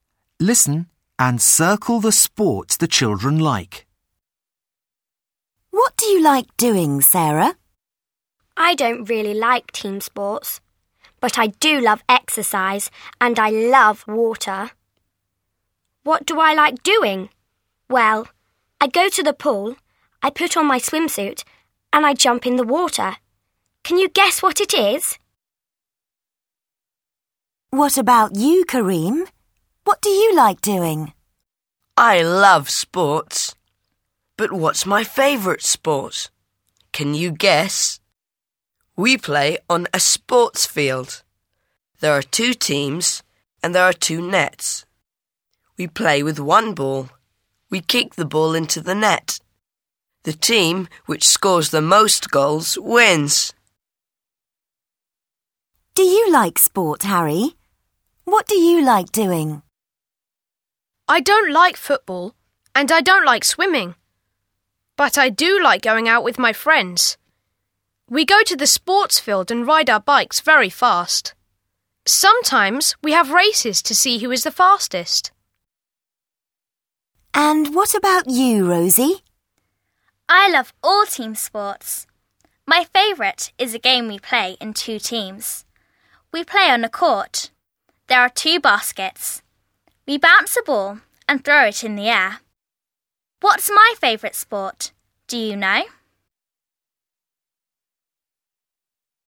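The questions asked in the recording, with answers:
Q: Can you guess what it is?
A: swimming

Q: Can you guess?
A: football

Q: What do you like doing?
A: riding bikes (cycling)

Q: What's my favourite sport? Do you know?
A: basketball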